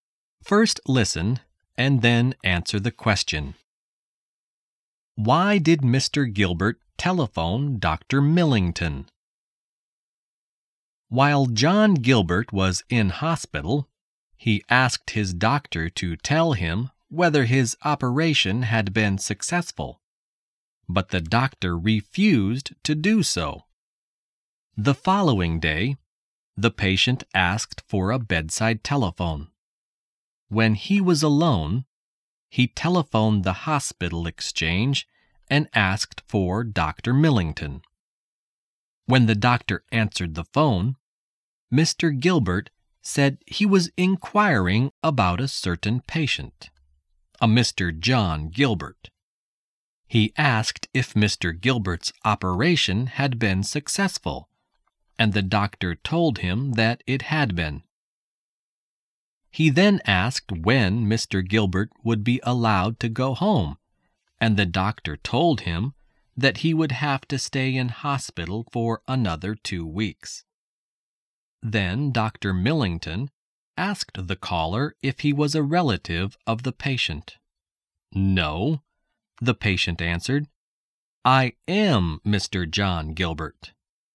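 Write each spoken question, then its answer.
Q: Why did Mr. Gilbert telephone Dr. Millington?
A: To find out whether his operation had been successful, since the doctor had refused to tell him.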